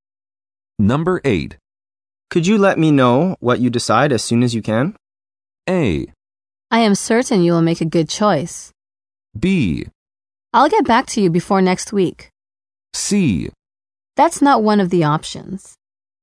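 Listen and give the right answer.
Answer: B: I'll get back to you before next week.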